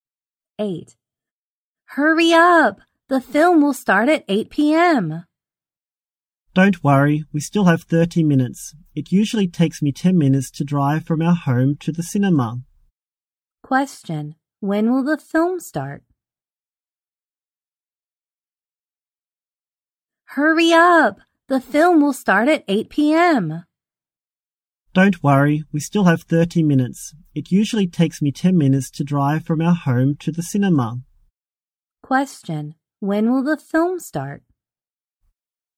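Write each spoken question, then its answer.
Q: Question. When will the film start?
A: At 8 p.m.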